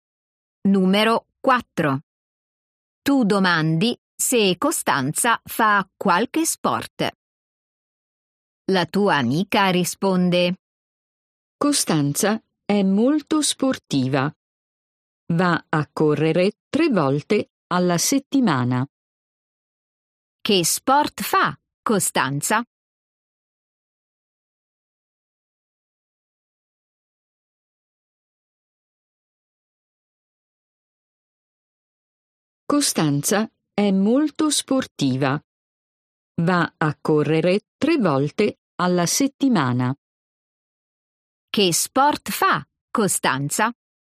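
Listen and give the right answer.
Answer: La corsa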